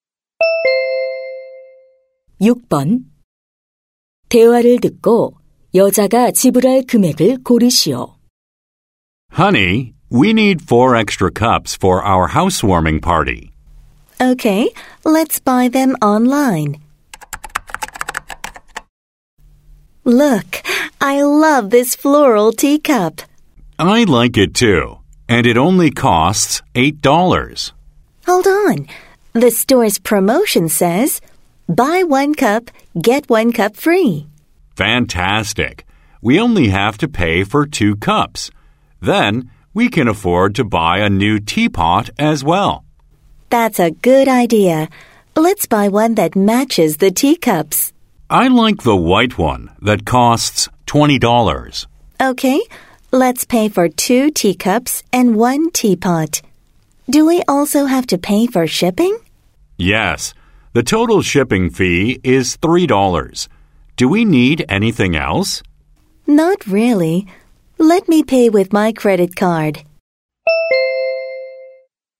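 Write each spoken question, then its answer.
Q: 대화를 듣고 여자가 지불할 금액을 고르시오.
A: $39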